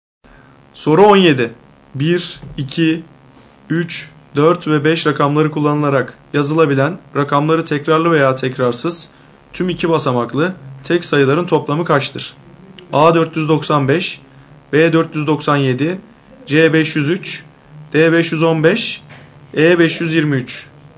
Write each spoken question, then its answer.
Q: 1, 2, 3, 4 ve 5 rakamları kullanılarak yazılabilen rakamları tekrarlı veya tekrarsız tüm 2 basamaklı tek sayıların toplamı kaçtır?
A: Doğru cevap A 495.